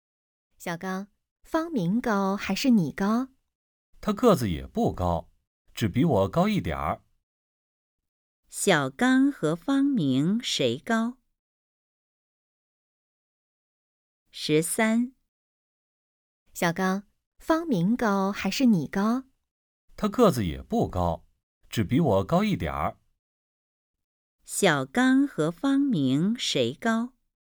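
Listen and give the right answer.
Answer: 方明高一点儿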